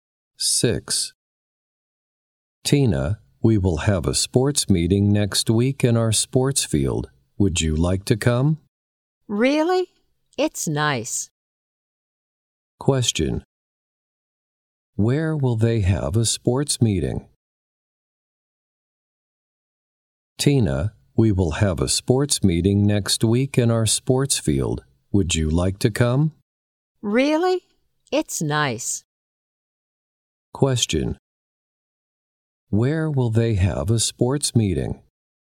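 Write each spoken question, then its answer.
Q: Where will they have a sports meeting?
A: In their sports field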